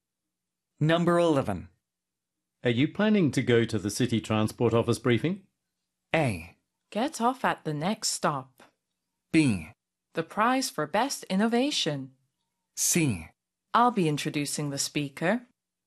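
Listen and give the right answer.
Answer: C: I'll be introducing the speaker.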